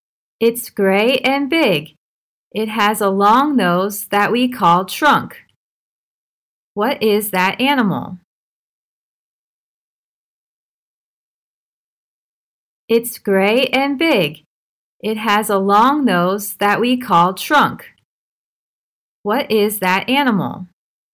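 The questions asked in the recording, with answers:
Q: What is that animal?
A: An elephant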